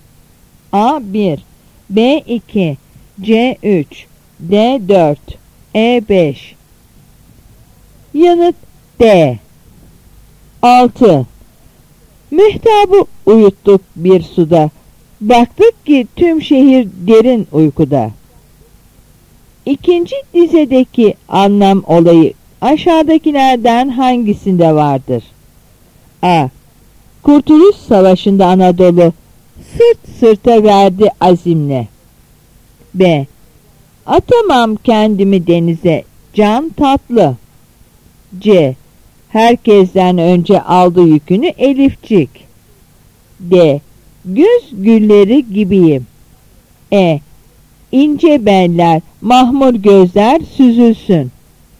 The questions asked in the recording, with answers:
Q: İkinci dizedeki anlam olayı aşağıdakilerden hangisinde vardır?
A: Yanıt A.